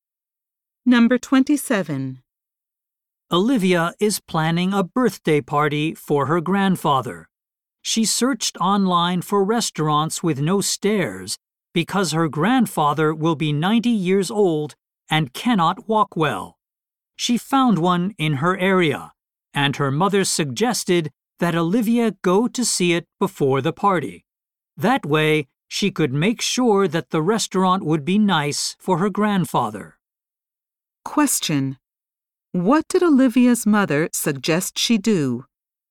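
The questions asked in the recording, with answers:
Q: What did Olivia's mother suggest she do?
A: Go to see the restaurant before the party.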